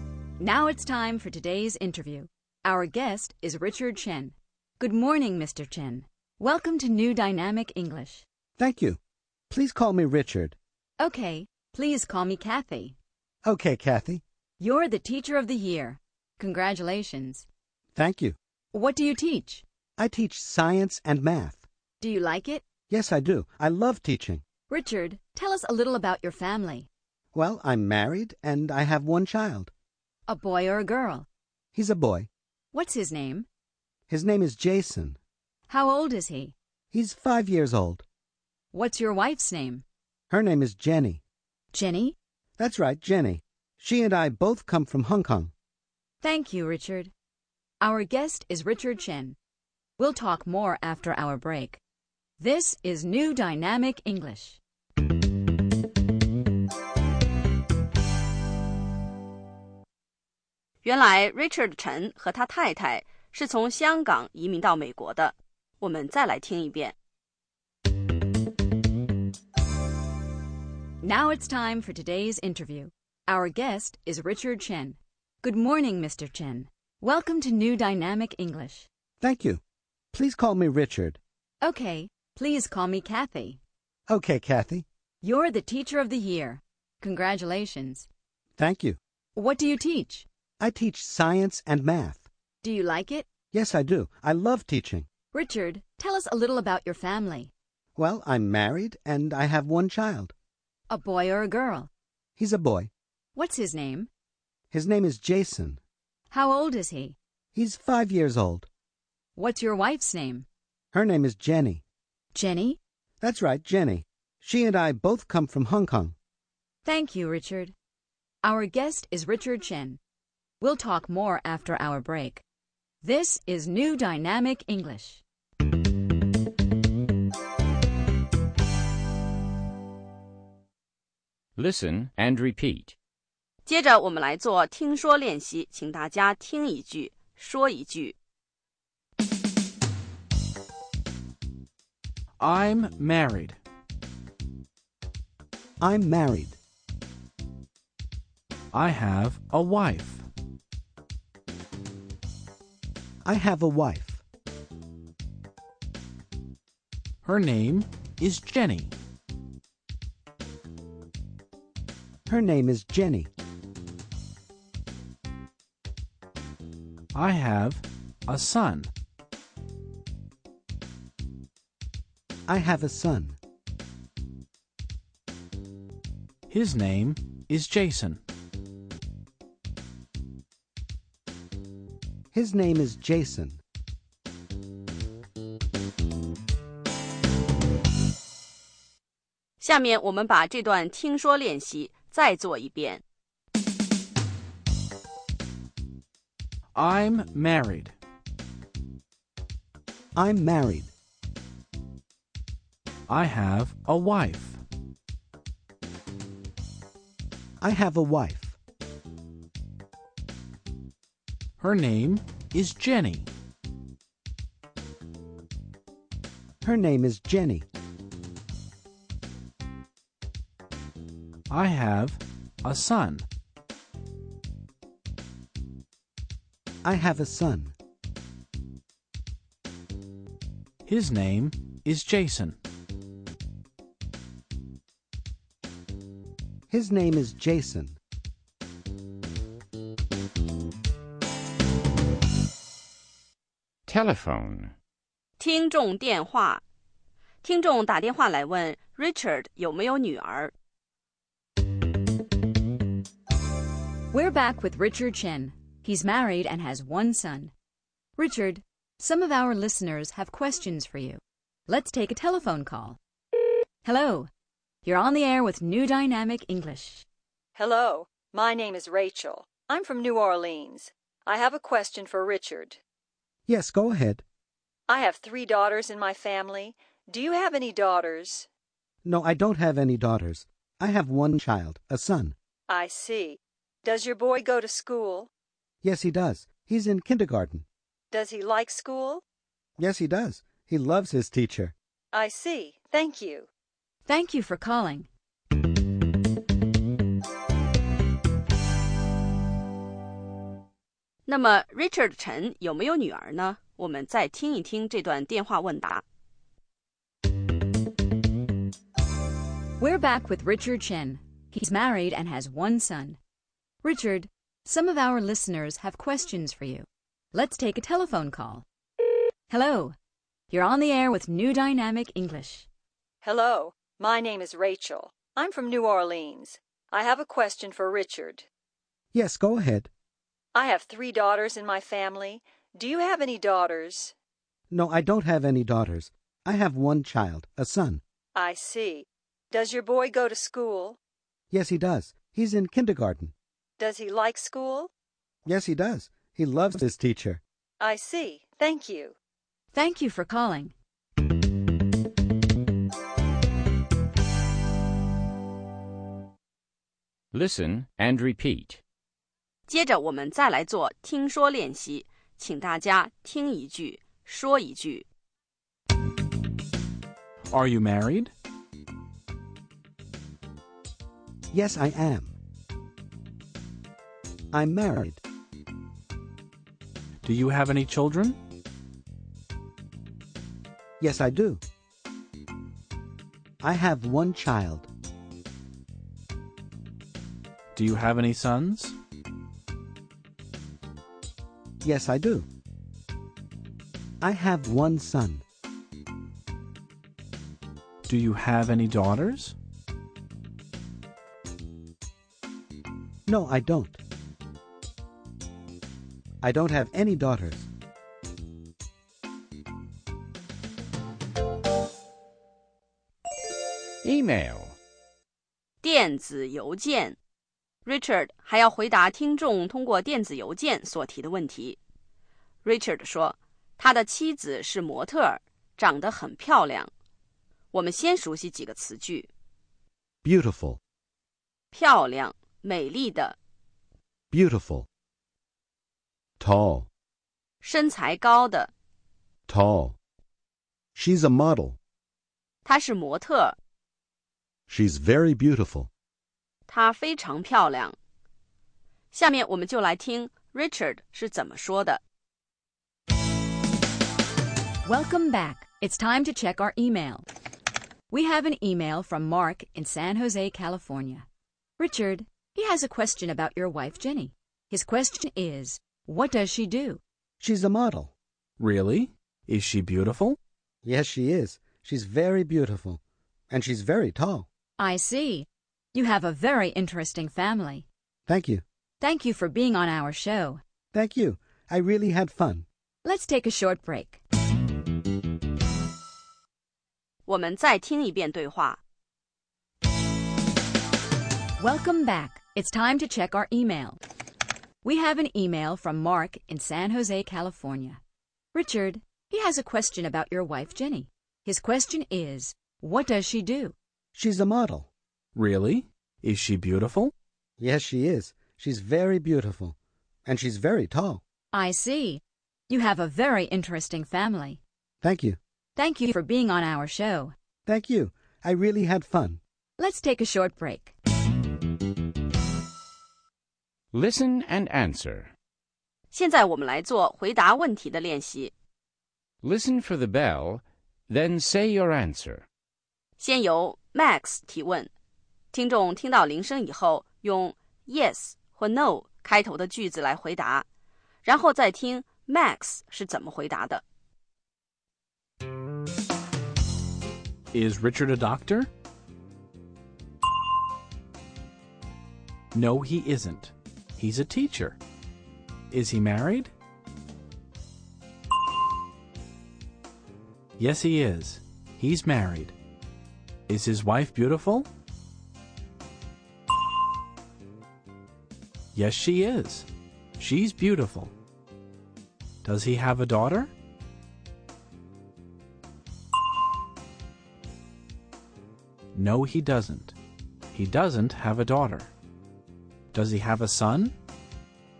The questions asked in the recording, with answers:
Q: Is Richard a doctor?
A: No, he isn't. He's a teacher.

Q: Is he married?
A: Yes, he is. He's married.

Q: Is his wife beautiful?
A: Yes, she is. She's beautiful.

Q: Does he have a son?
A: Yes, he does. He has one son.